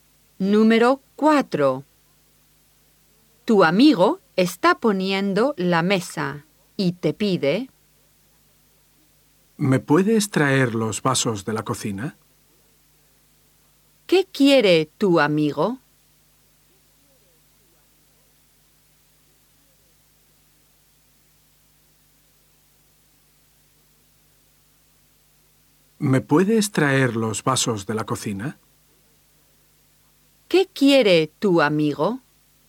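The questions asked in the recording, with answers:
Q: ¿Qué quiere tu amigo?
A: Que le traigas los vasos de la cocina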